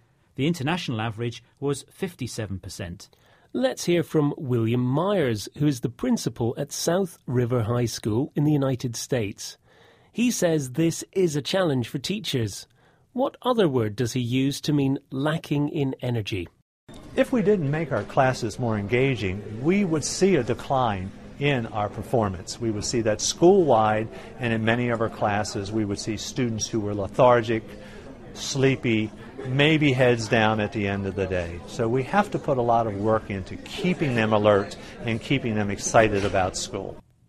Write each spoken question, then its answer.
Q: What other word does he use to mean lacking in energy?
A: The word he used was lethargic.